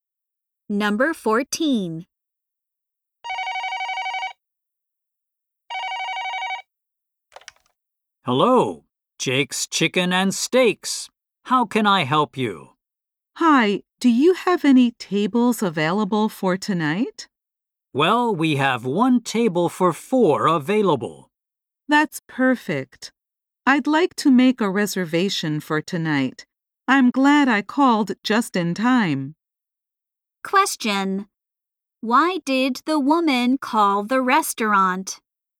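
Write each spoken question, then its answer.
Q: Why did the woman call the restaurant?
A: To make a reservation for tonight.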